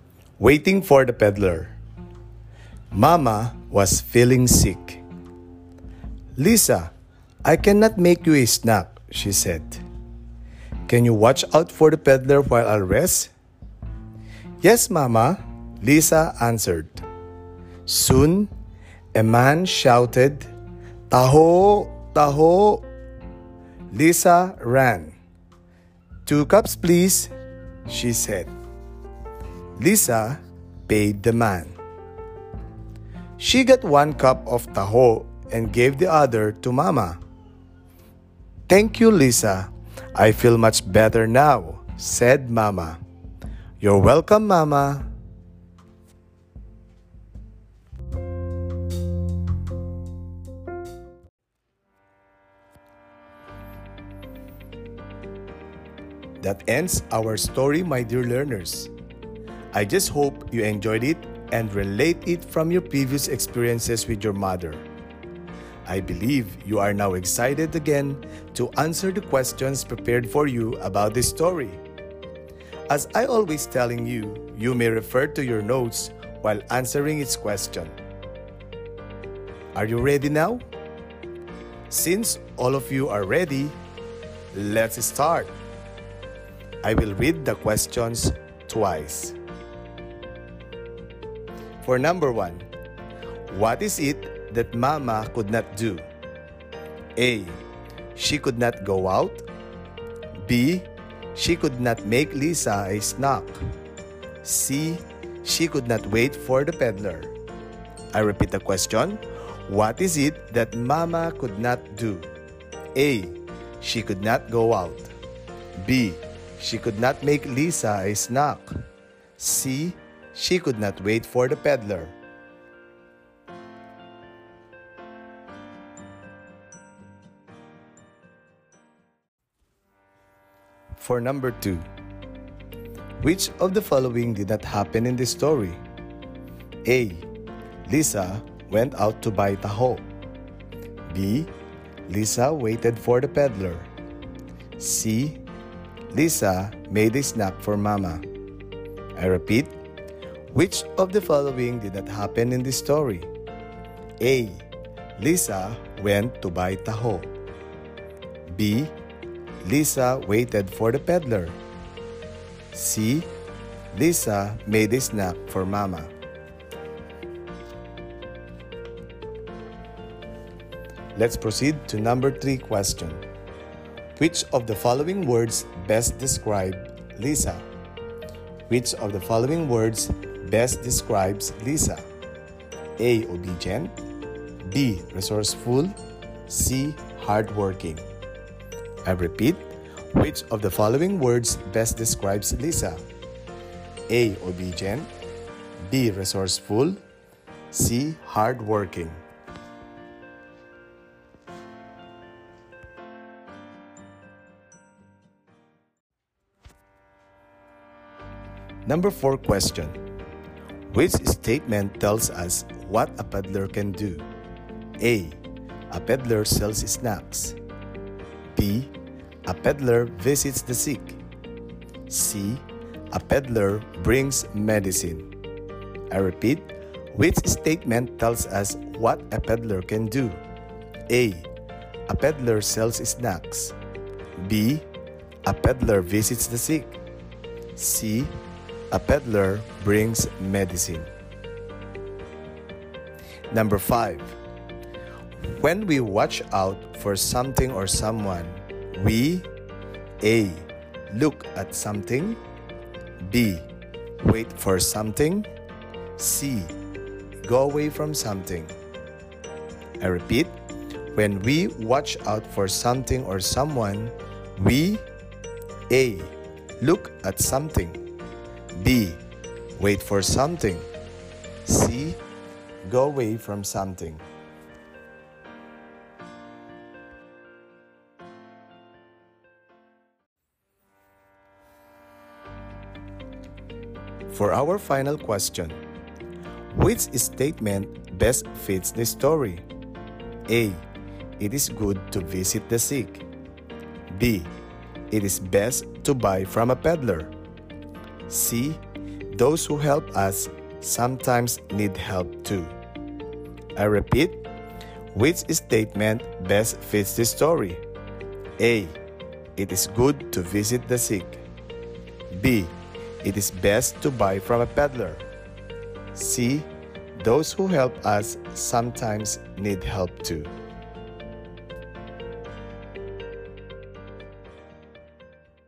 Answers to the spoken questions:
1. the answer is letter B.
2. the answer is letter C.
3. the answer is letter A.
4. The correct answer is letter A.
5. The correct answer is letter B.
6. the correct answer for number 6 is letter C.